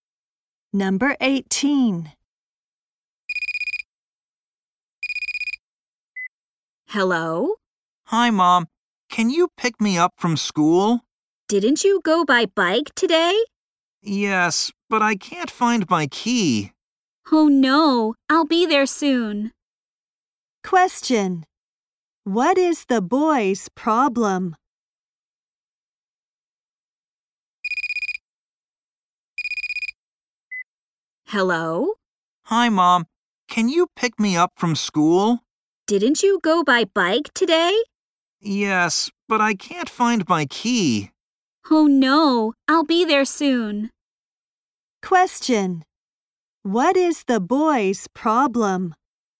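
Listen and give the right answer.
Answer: He can't find his key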